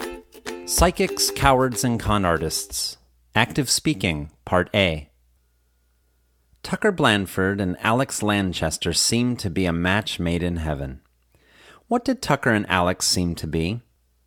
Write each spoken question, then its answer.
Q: What did Tucker and Alex seem to be?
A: Tucker and Alex seemed to be a match made in heaven.